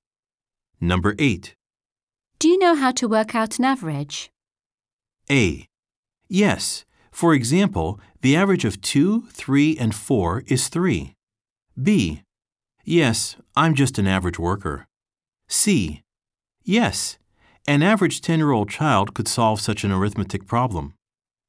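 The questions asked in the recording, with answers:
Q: Do you know how to work out an average?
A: A: Yes. For example, the average of 2, 3, and 4 is 3.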